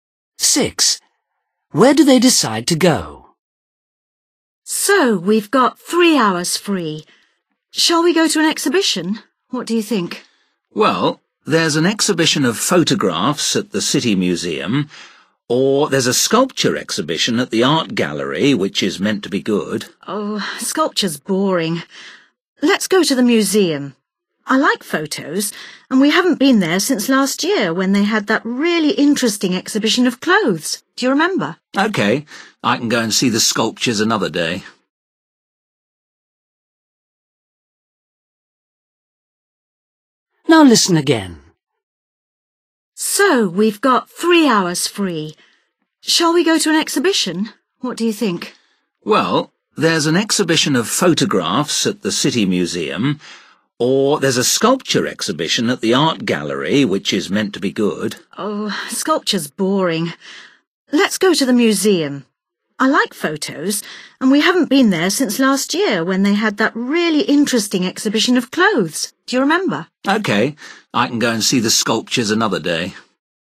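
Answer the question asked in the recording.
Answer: the City Museum (photography exhibition)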